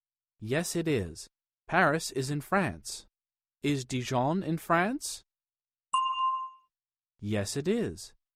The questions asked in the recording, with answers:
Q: Is Dijon in France?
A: Yes, it is.